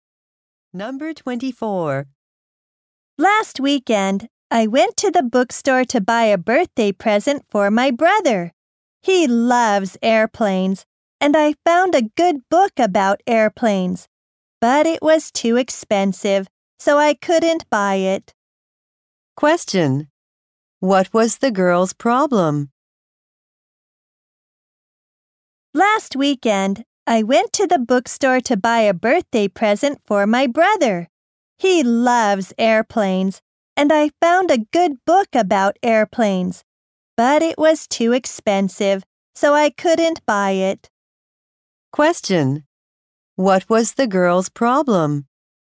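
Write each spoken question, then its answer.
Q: What was the girl's problem?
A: The book was too expensive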